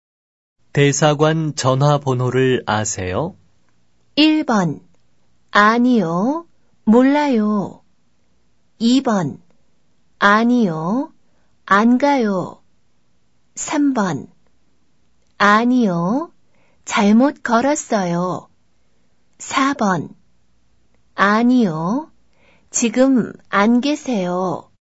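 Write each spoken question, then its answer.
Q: 대사관 전화번호를 아세요?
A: 1: 아니요, 몰라요.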